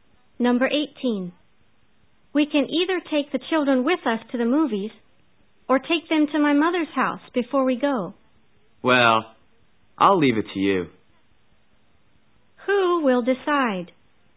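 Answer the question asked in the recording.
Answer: The first speaker, who suggested the options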